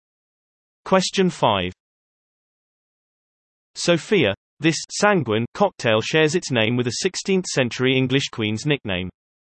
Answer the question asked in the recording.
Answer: The answer is Bloody Mary.